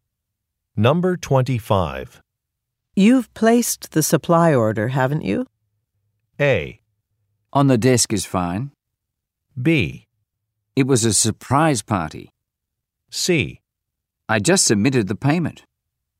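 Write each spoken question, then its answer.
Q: You've placed the supply order, haven't you?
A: C: I just submitted the payment.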